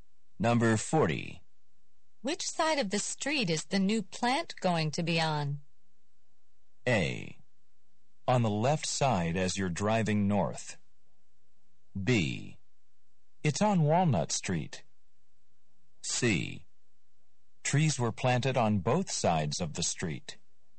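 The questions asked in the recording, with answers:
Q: Which side of the street is the new plant going to be on?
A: A: On the left side as you're driving north.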